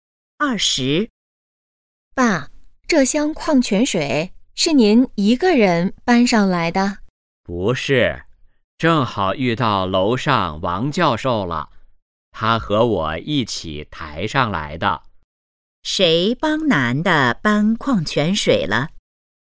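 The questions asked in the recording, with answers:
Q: 谁帮男的搬矿泉水了?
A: 王教授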